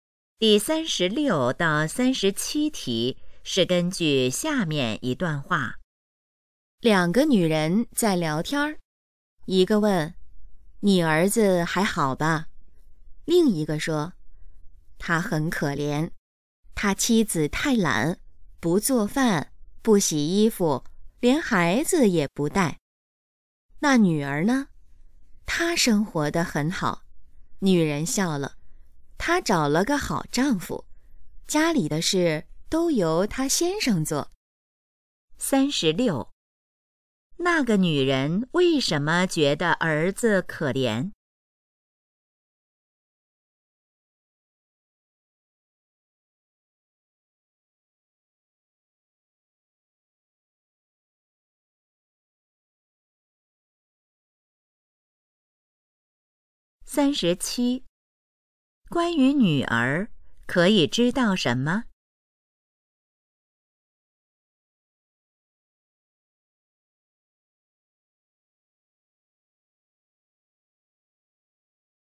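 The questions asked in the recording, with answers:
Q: 那个女人为什么觉得儿子可怜?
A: 他妻子太懒

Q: 关于女儿,可以知道什么?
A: 她丈夫做家务,她生活得很好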